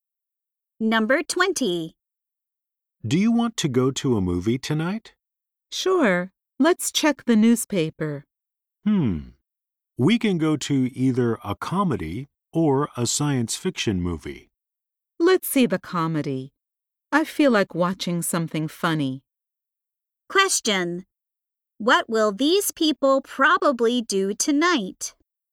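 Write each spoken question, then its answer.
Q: What will these people probably do tonight?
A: See a comedy movie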